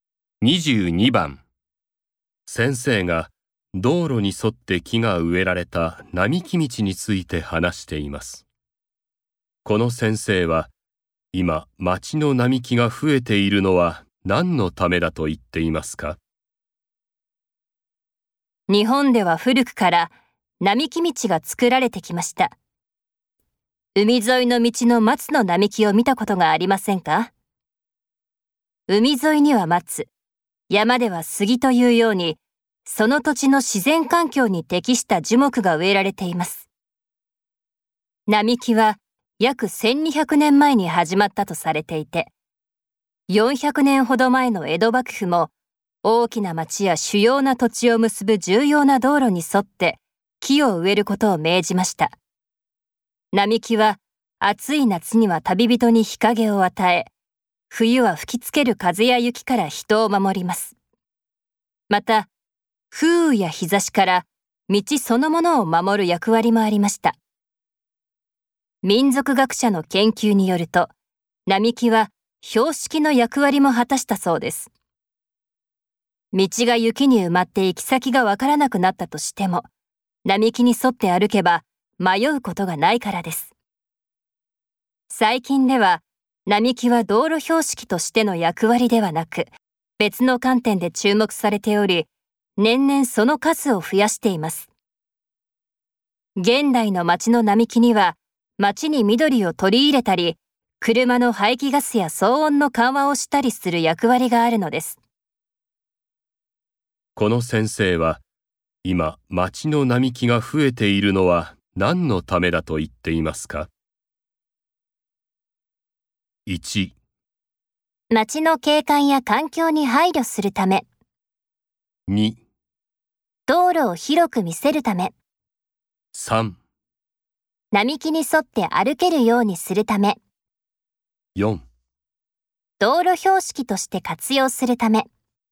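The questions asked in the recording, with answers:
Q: この先生は、今街の並木が増えているのは何のためだと言っていますか?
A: 1: 街の景観や環境に配慮するため。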